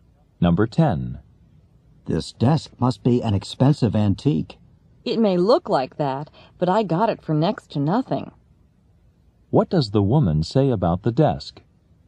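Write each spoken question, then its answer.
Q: What does the woman say about the desk?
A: She got it very cheaply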